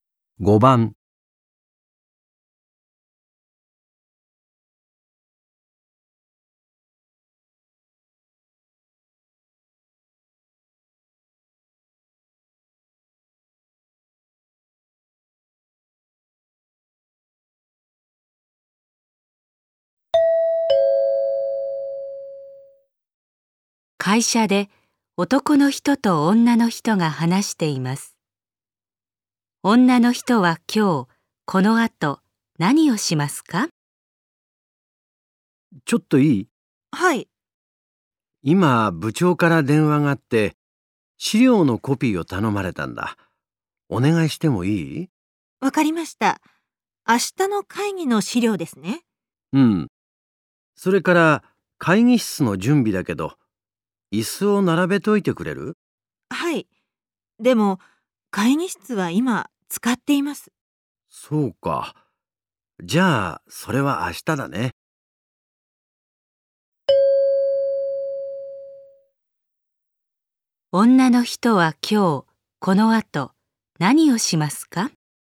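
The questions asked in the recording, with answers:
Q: 女の人は今日、この後、何をしますか?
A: 資料のコピー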